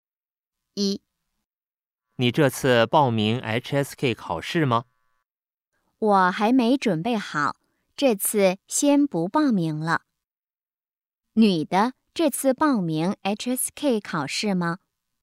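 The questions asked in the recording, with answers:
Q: 女的,这次报名 HSK 考试吗?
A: 不报名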